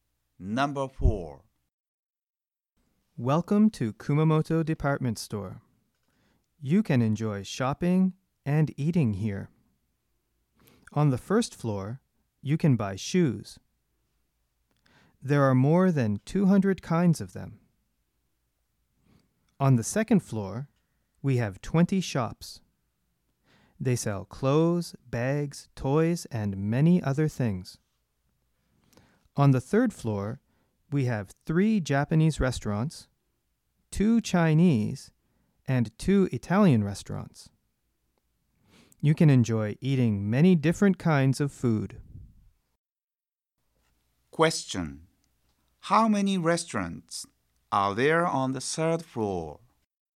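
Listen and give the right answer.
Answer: Seven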